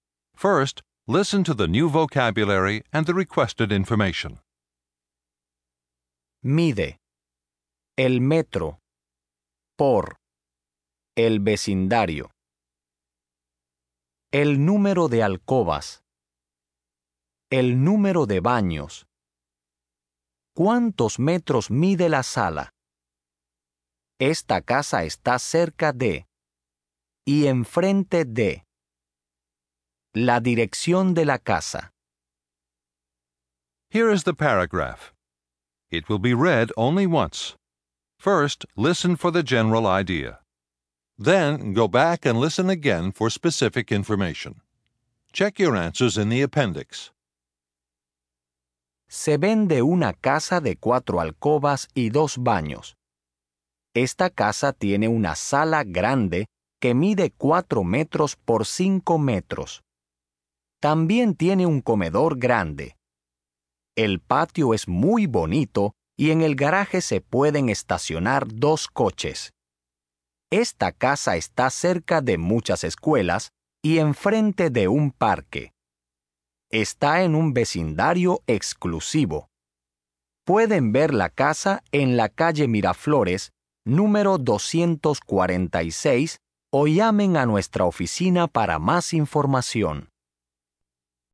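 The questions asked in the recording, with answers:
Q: ¿Cuántos metros mide la sala?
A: 4 metros por 5 metros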